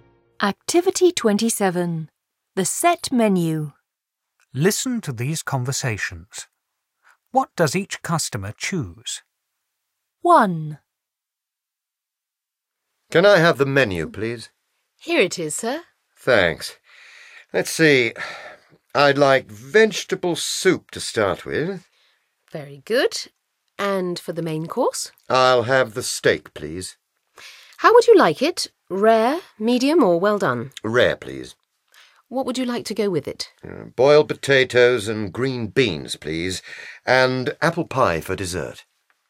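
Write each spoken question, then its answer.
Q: What does each customer choose?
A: Vegetable soup, rare steak with boiled potatoes and green beans, and apple pie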